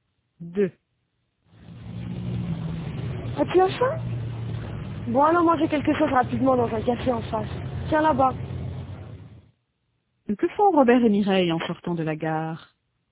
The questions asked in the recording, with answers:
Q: Que font Robert et Mireille en sortant de la gare?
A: Ils vont manger quelque chose.